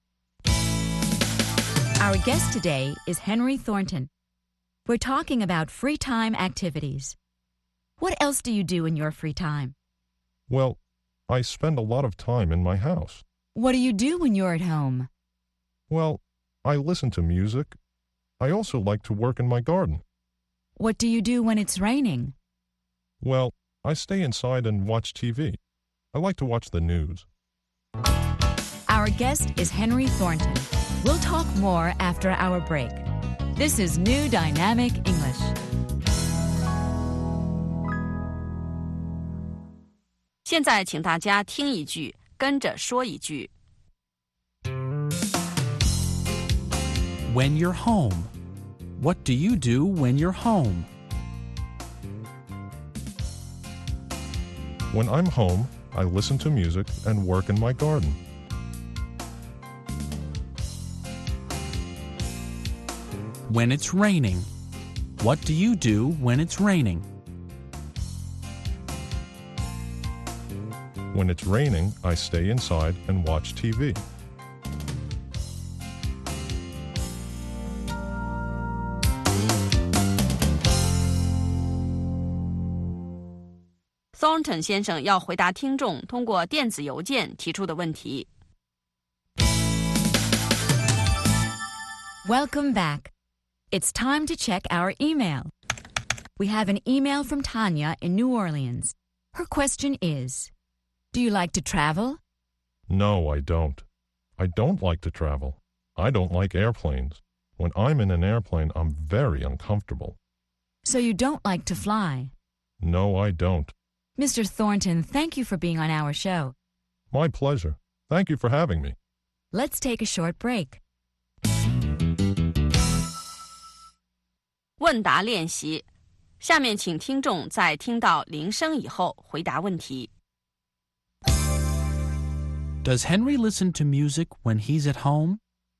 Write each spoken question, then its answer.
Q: Does Henry listen to music when he's at home?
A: Yes, he does. He listens to music.